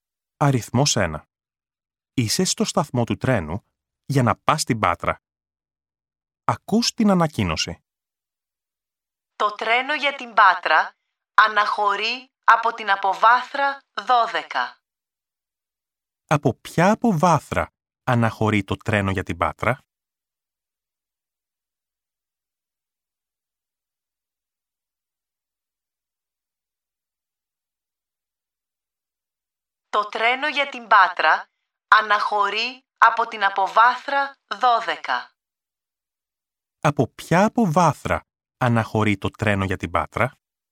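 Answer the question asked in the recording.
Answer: Από την αποβάθρα 12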